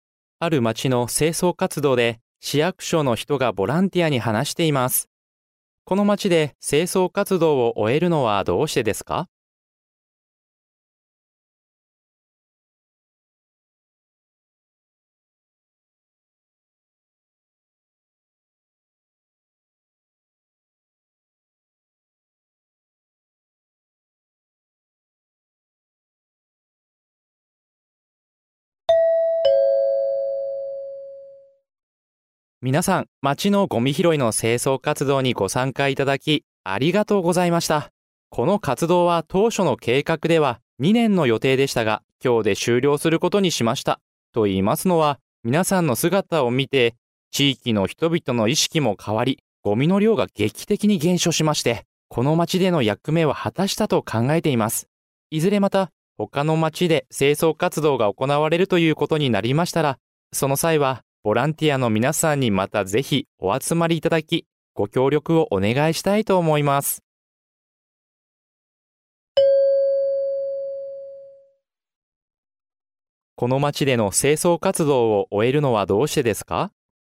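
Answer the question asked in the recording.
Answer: 町のゴミの量が劇的に減り、この町での役目は果たしたと考えたから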